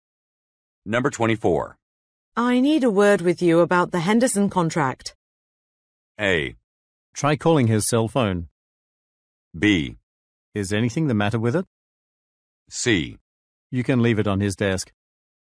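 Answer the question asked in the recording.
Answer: B: Is anything the matter with it?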